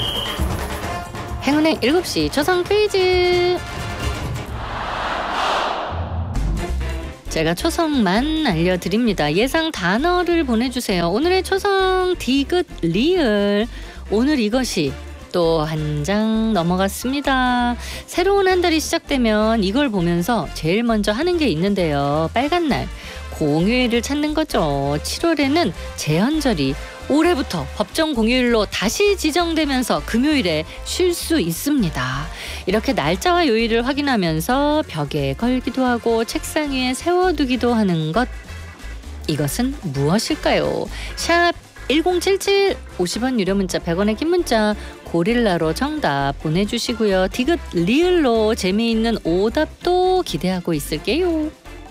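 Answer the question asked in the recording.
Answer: 달력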